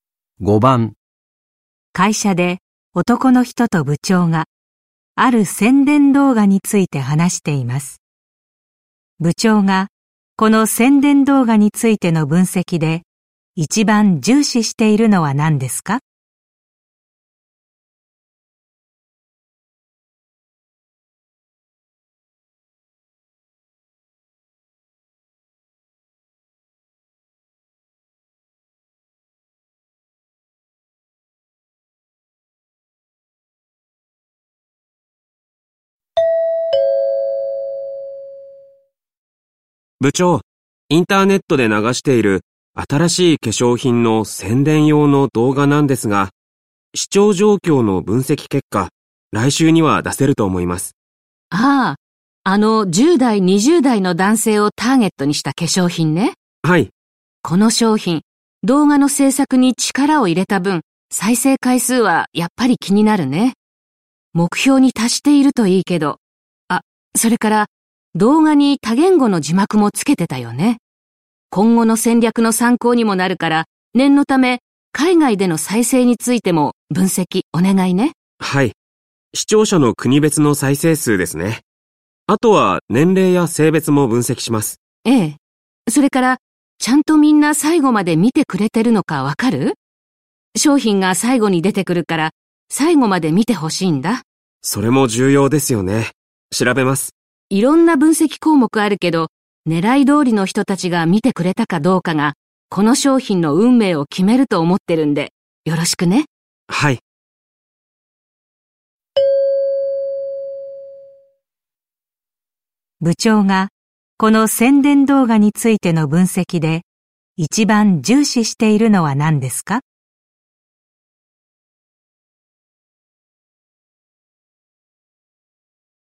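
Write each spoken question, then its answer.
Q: 部長が、この宣伝動画についての分析で、一番重視しているのは何ですか?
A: ターゲットの10代、20代の男性が見てくれたかどうか(視聴者の年齢・性別)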